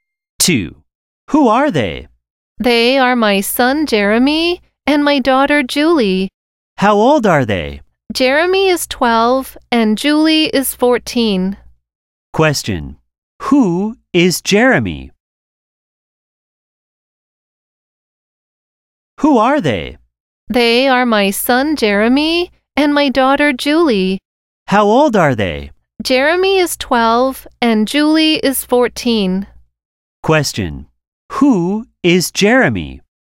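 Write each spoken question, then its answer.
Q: Who is Jeremy?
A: The speaker's son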